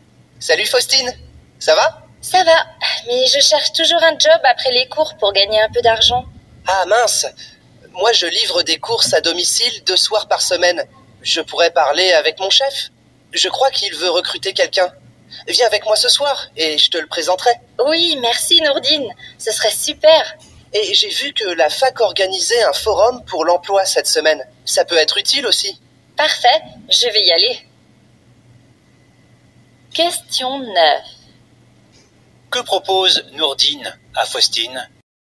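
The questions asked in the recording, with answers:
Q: Que propose Nourdine à Faustine?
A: De venir avec lui ce soir pour la présenter à son chef, qui veut recruter quelqu'un.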